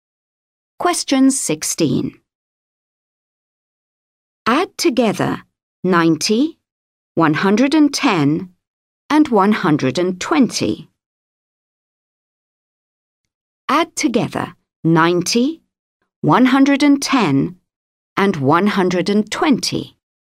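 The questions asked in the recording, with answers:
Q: Add together 90, 110, and 120.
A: 320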